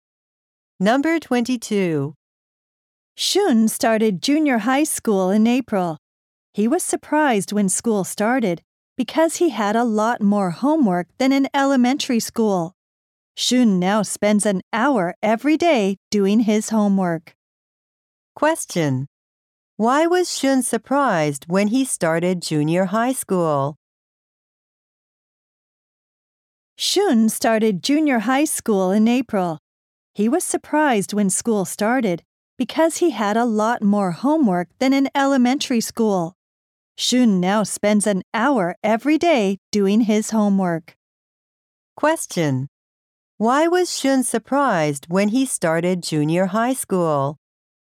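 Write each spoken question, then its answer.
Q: why was Shun surprised when he started junior high school?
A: He had a lot more homework than in elementary school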